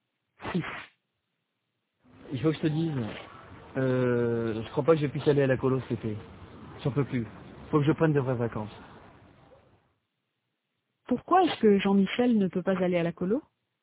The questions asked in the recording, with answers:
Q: Pourquoi est-ce que Jean-Michel ne peut pas aller à la colo?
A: Parce qu'il n'en peut plus.